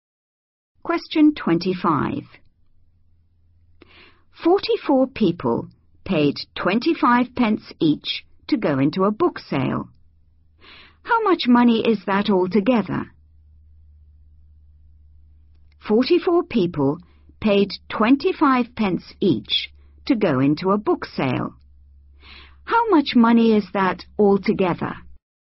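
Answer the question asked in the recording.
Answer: £11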